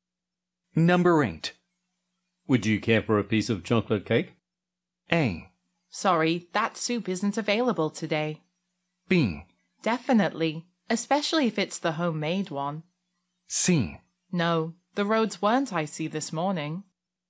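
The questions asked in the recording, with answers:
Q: Would you care for a piece of chocolate cake?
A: B: Definitely, especially if it's the homemade one.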